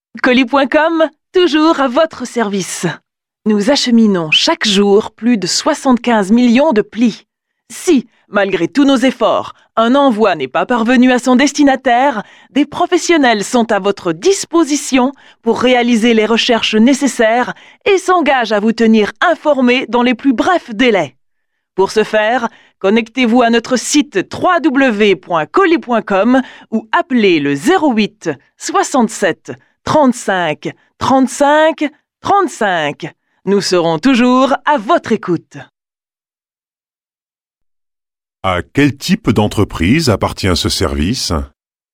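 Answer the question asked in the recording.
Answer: Une entreprise de livraison de colis et de courrier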